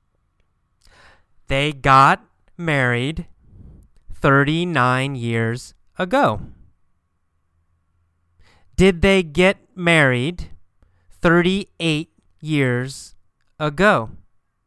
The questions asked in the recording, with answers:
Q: Did they get married 38 years ago?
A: No, not 38. They got married 39 years ago.